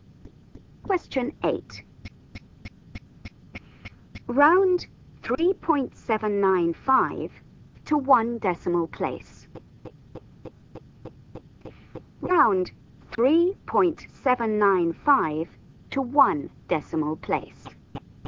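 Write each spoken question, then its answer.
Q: Round 3.795 to one decimal place.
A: 3.8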